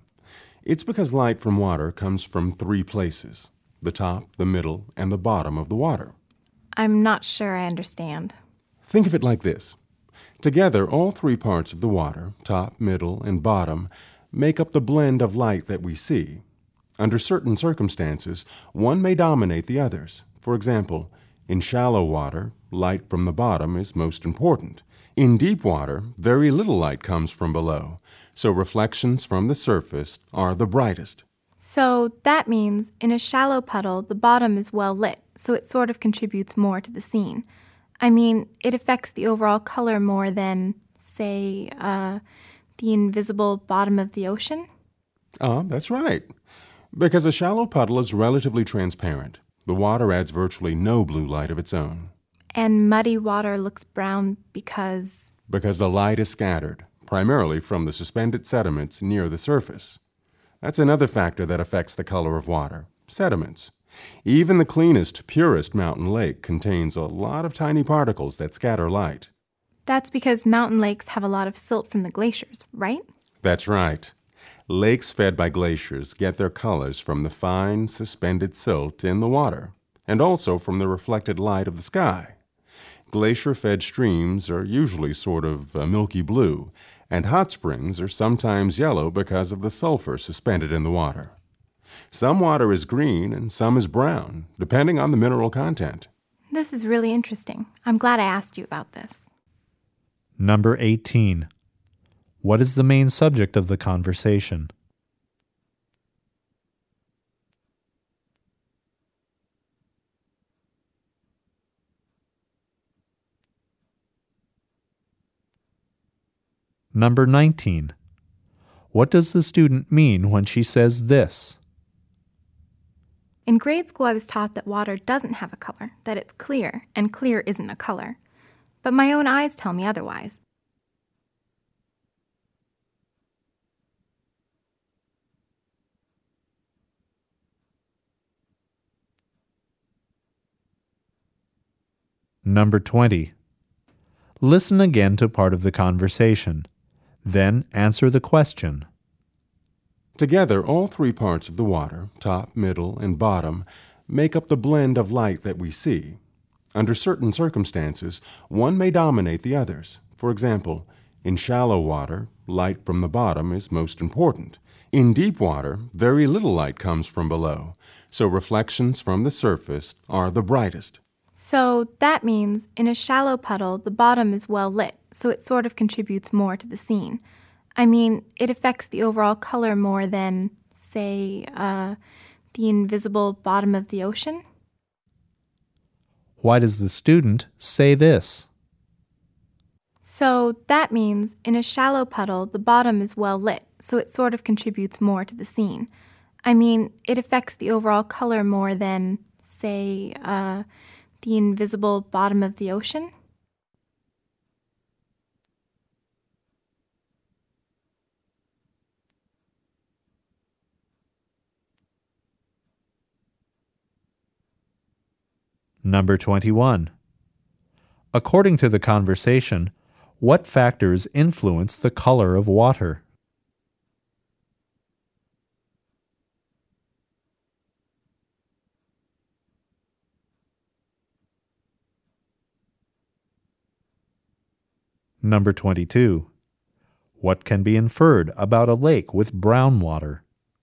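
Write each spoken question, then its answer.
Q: What is the main subject of the conversation?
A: Why water looks like it has different colors

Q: According to the conversation, what factors influence the color of water?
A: Its depth (light from the top, middle and bottom), suspended sediments and minerals, and reflected skylight

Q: What can be inferred about a lake with brown water?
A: It has sediments or minerals suspended near the surface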